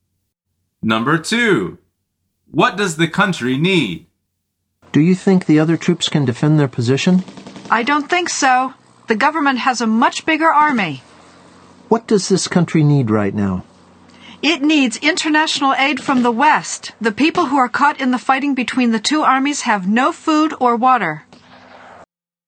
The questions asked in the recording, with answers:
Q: What does the country need?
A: The answer is international aid.